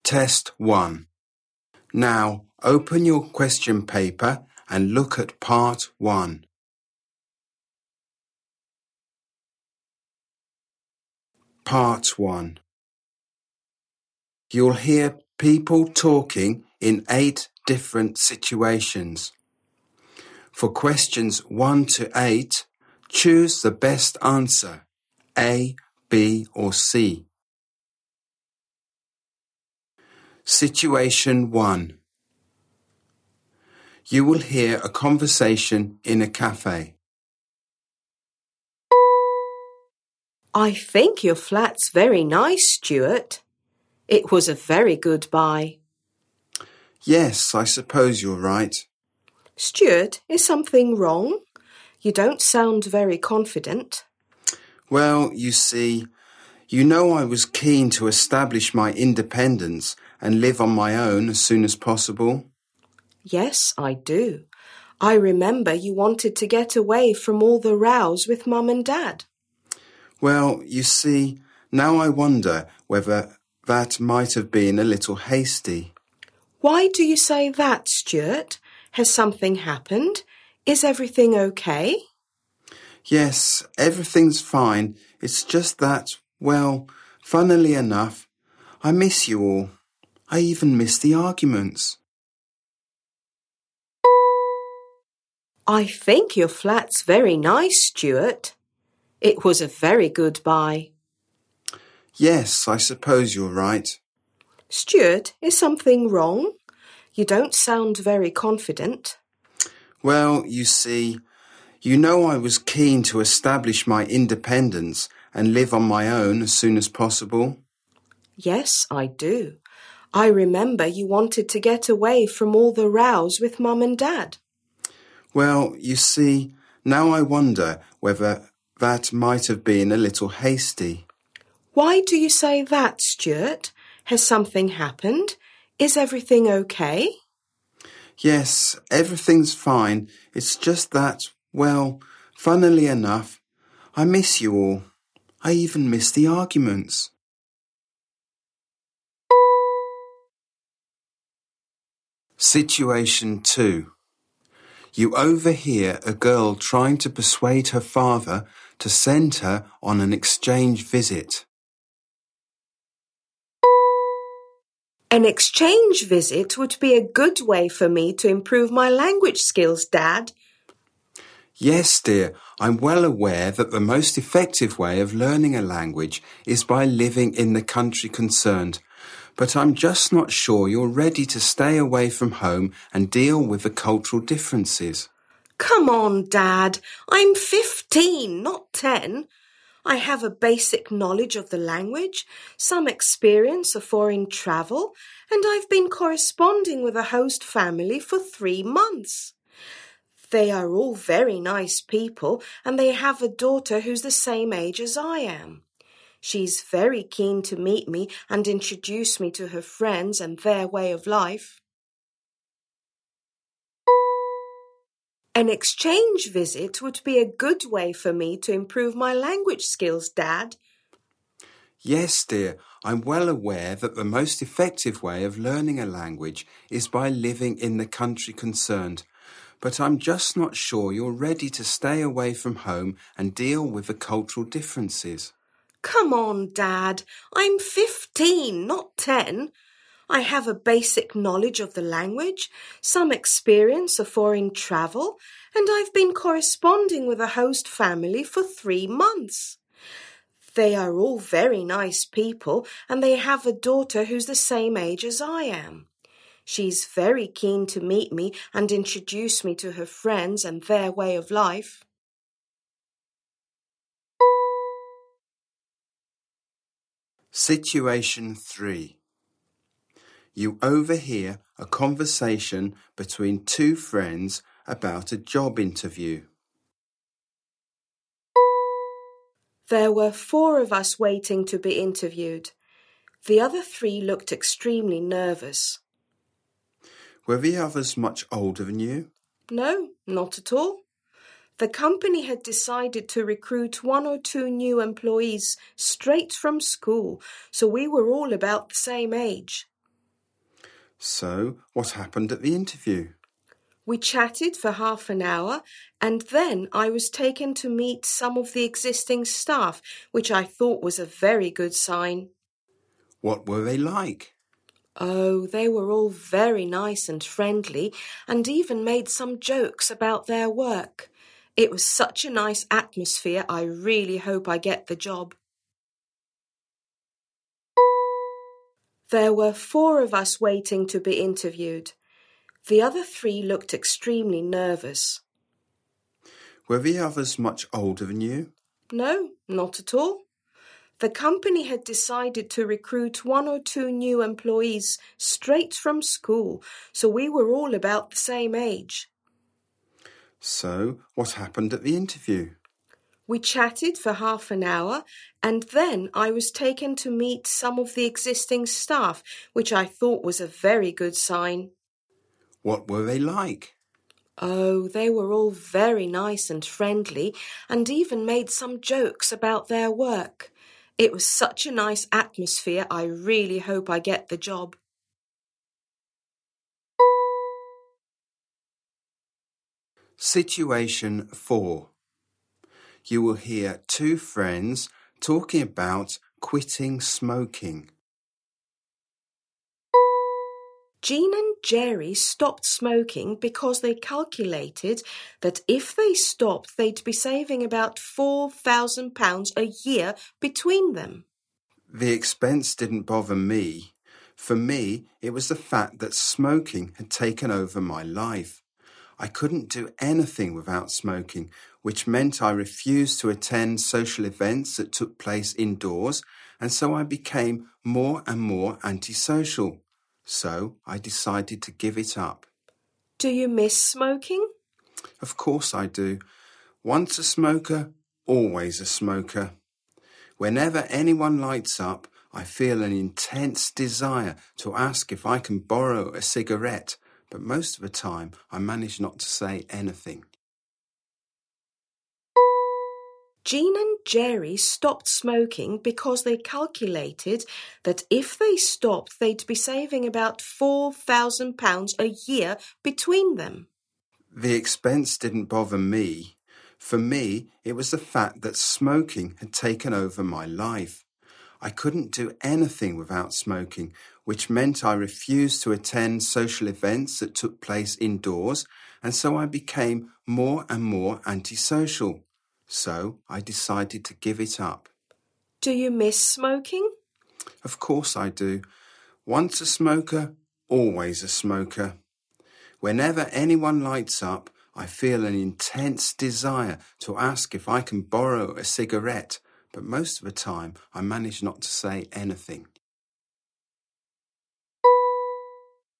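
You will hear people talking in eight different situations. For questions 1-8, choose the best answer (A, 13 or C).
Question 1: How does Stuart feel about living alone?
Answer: He regrets it a little, as he misses his family, even the arguments

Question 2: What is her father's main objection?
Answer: He thinks she is not ready to stay away from home and deal with cultural differences

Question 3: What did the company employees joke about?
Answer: Their work

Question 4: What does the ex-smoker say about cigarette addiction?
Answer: Once a smoker, always a smoker; she still wants a cigarette when others smoke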